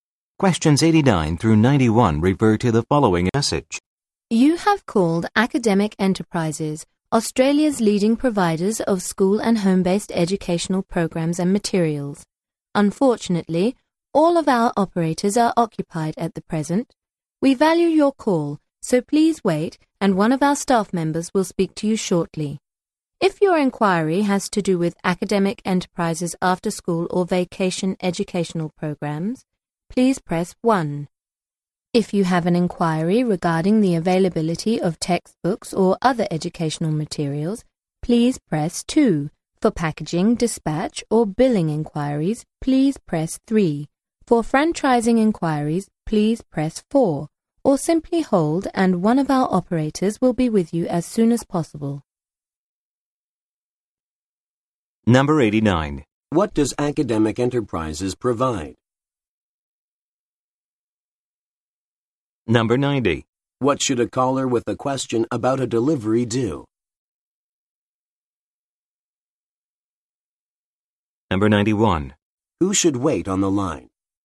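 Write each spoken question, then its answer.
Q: What does Academic Enterprises provide?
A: School and home-based educational programs and materials

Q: What should a caller with a question about a delivery do?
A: Press 3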